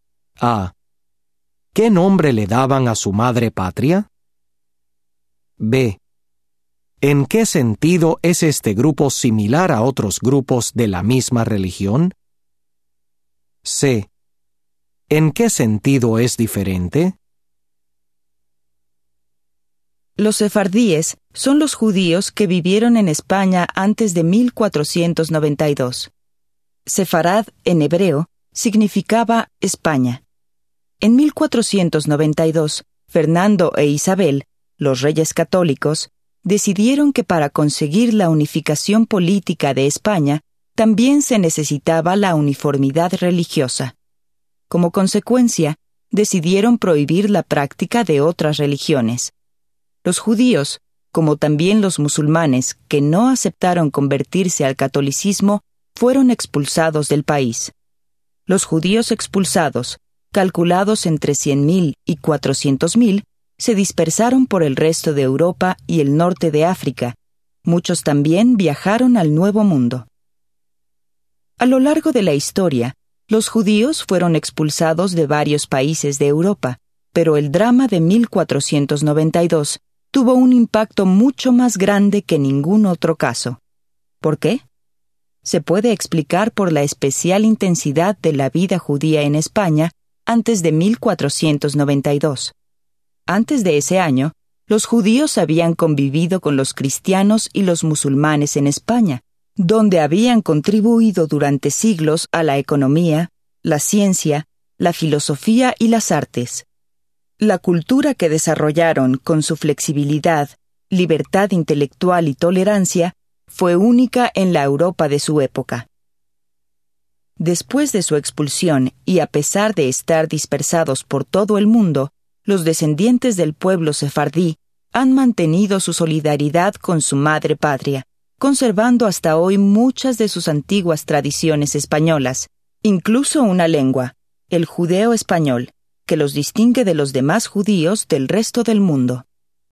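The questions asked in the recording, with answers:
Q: ¿Qué nombre le daban a su madre patria?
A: Sefarad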